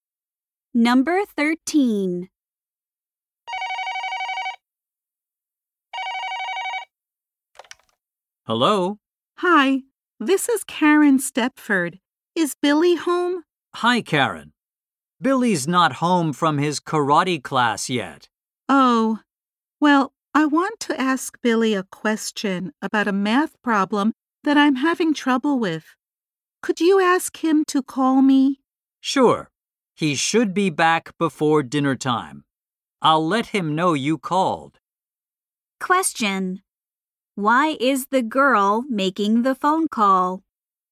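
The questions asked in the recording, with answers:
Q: Why is the girl making the phone call?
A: She wants to ask Billy about a math problem.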